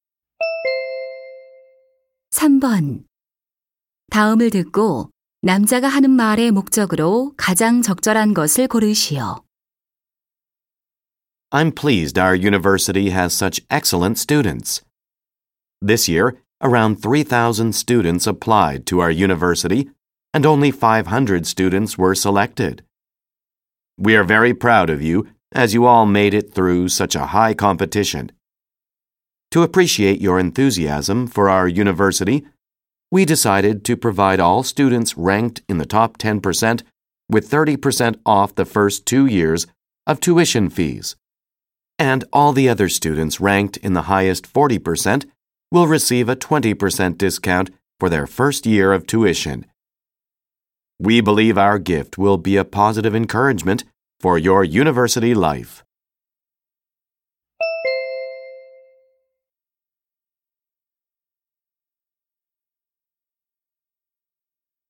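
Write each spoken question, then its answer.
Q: 다음을 듣고 남자가 하는 말의 목적으로 가장 적절한 것을 고르시오.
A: 성적 우수 신입생에게 등록금 할인 혜택을 알리려고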